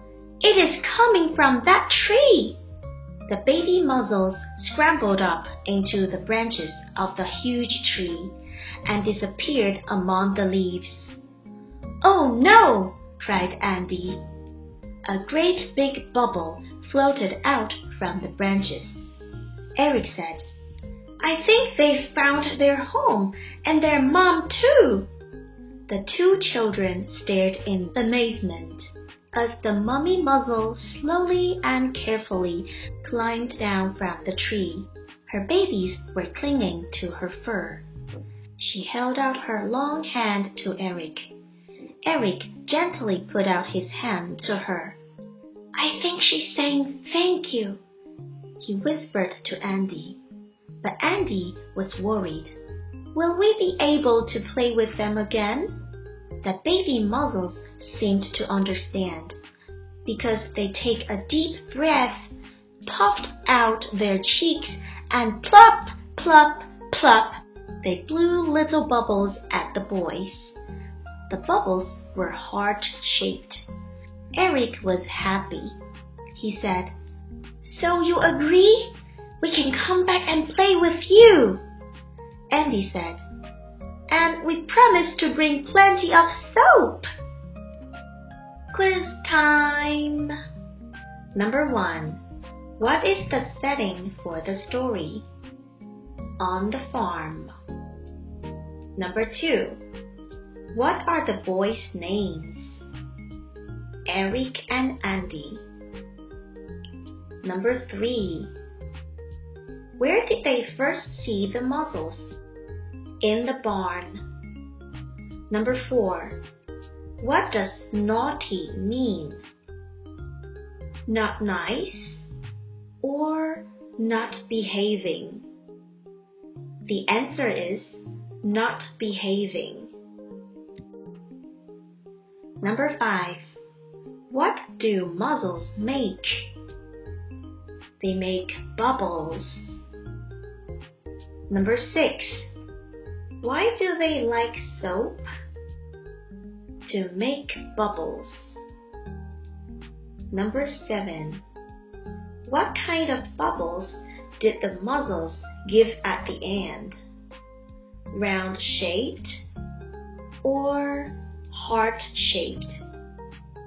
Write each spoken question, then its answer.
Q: What kind of bubbles did the mozzles give at the end?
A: The answer is heart shaped.